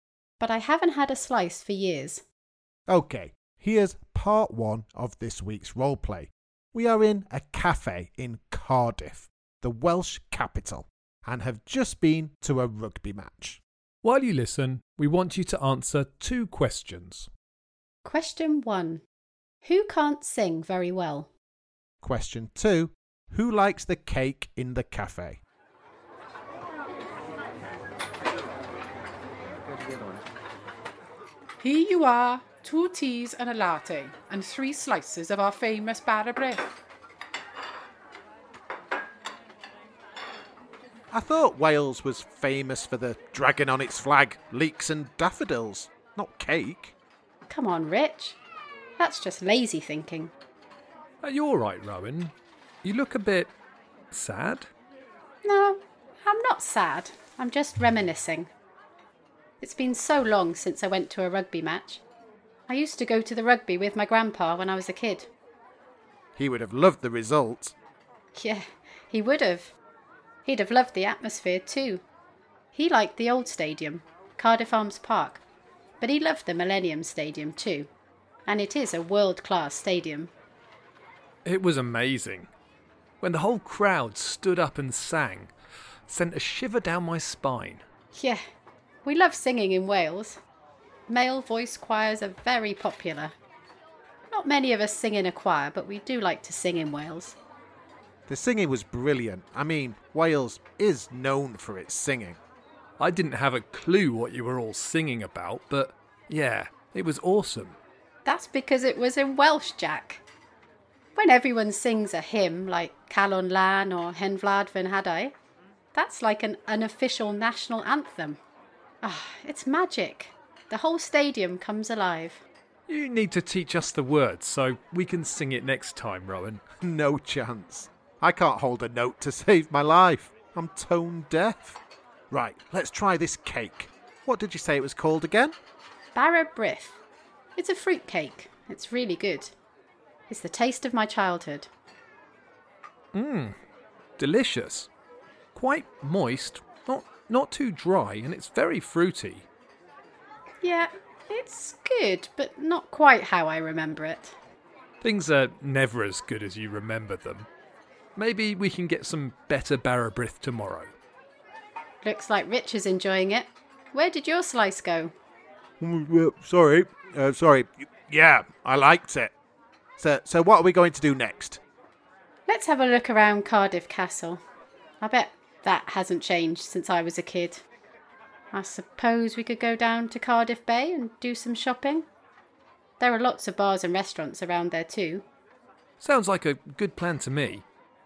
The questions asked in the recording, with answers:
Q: Who likes the cake in the cafe?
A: The answer again is Rich.